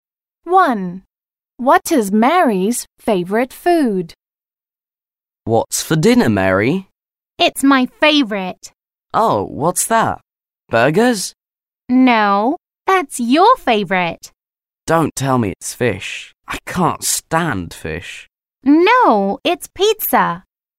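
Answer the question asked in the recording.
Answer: Pizza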